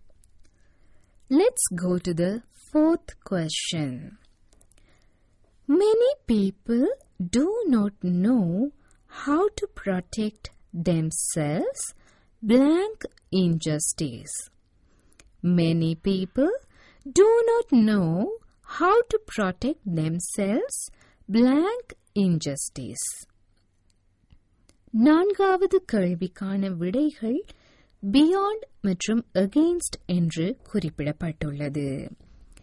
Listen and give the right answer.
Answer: அதாவது அநீதிக்கு எதிராக against என்பதுதான் சரியான விடை.